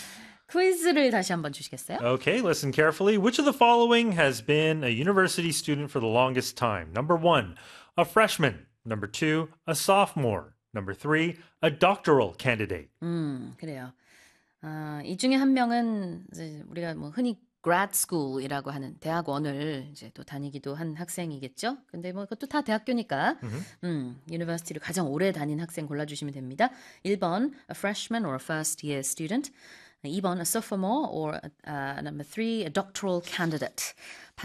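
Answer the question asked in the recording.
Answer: 3: a doctoral candidate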